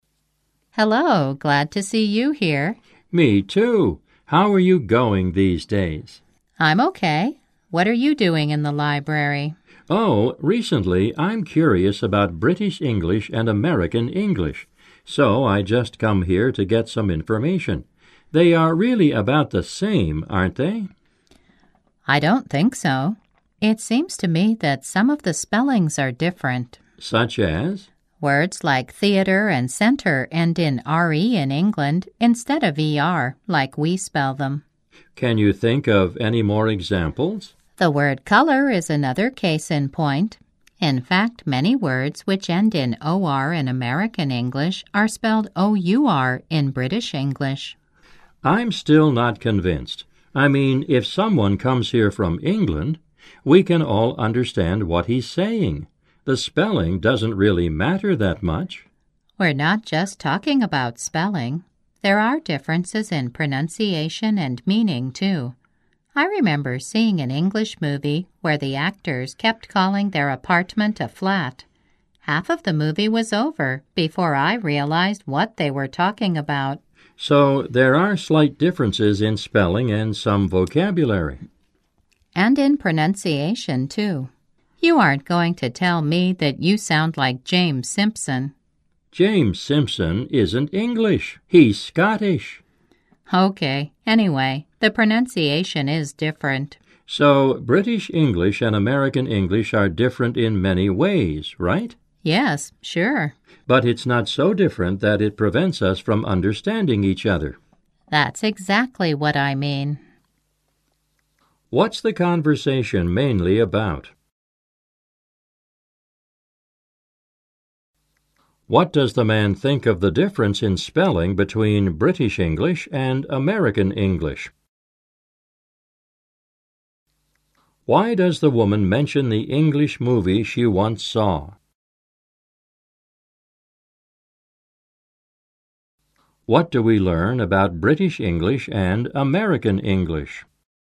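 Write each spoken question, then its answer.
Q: What's the conversation mainly about?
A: Differences between British English and American English

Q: What does the man think of the difference in spelling between British English and American English?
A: It doesn't really matter that much

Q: Why does the woman mention the English movie she once saw?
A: To show there are differences in vocabulary/meaning, such as flat for apartment

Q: What do we learn about British English and American English?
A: They differ in spelling, vocabulary and pronunciation, but not so much that speakers can't understand each other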